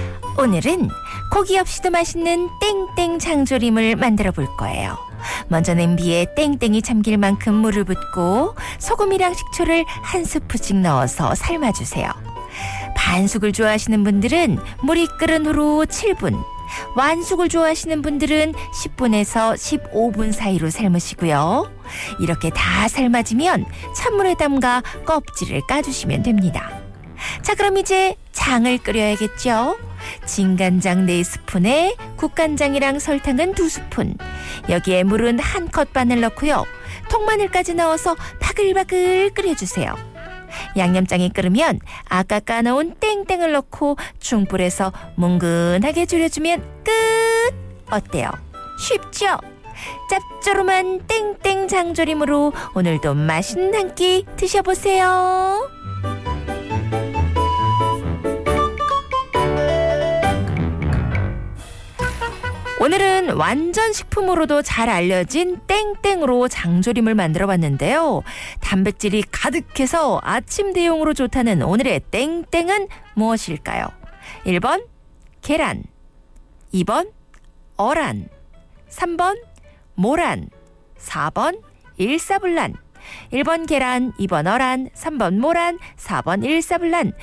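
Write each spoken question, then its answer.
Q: 단백질이 가득해서 아침 대용으로 좋다는 오늘의 땡땡은 무엇일까요?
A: 1: 계란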